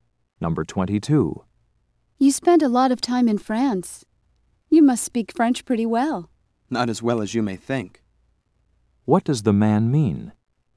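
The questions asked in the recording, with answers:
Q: What does the man mean?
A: His French is not very good.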